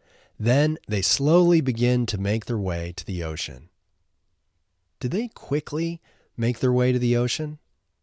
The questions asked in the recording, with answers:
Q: Do they quickly make their way to the ocean?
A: No, they slowly make their way to the ocean.